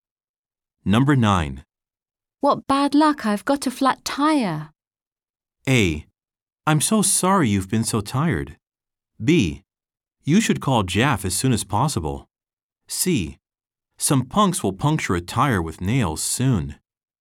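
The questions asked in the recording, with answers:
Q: What bad luck, I've got a flat tire.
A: B: You should call Jaff as soon as possible.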